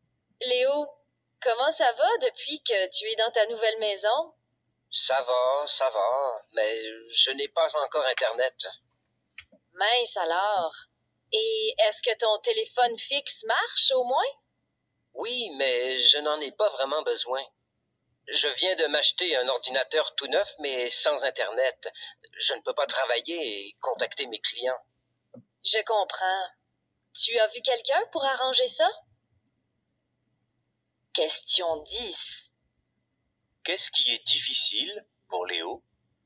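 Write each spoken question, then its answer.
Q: Qu'est-ce qui est difficile pour Léo?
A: Il n'a pas encore Internet, donc il ne peut pas travailler ni contacter ses clients.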